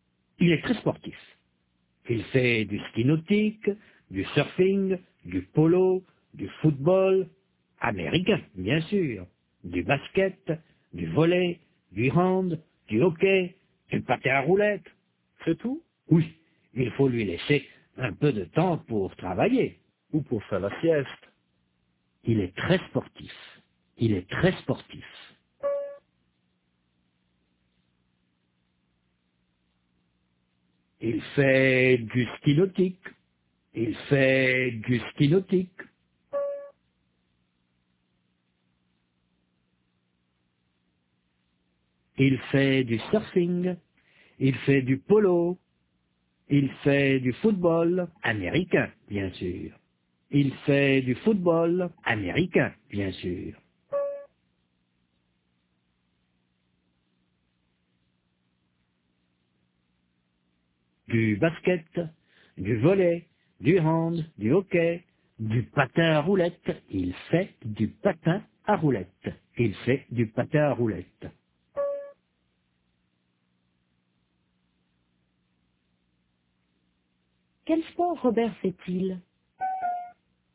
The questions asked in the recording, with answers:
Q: Quel sport Robert fait-il?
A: Il fait du ski nautique, du surfing, du polo, du football américain, du basket, du volley, du hand, du hockey, du patin à roulettes.